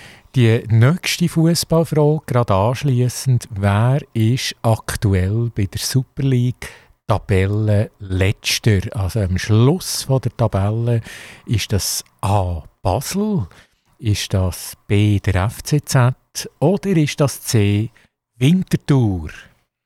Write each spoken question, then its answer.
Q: Also am Schluss von der Tabelle ist das A Basel, ist das B der FCZ oder ist das C Winterthur?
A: Und richtig ist äh, der FCZ äh, leider, muss man sagen.